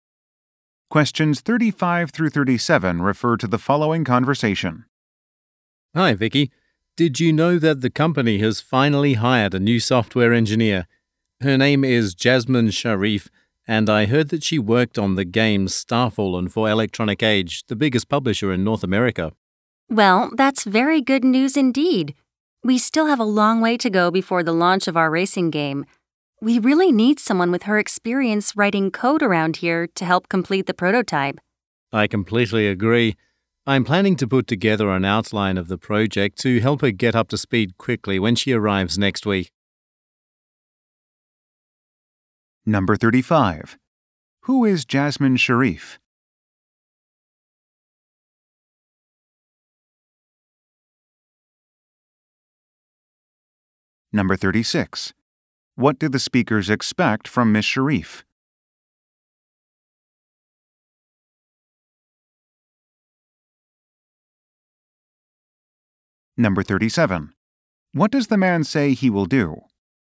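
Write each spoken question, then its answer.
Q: Who is Jasmine Sharif?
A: A new software engineer

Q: What do the speakers expect from Ms.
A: Help complete the game prototype with her coding experience

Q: What does the man say he will do?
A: Put together an outline of the project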